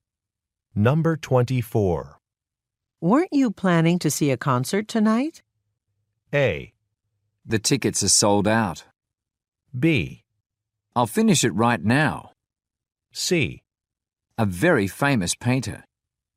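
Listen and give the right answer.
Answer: A: The tickets are sold out.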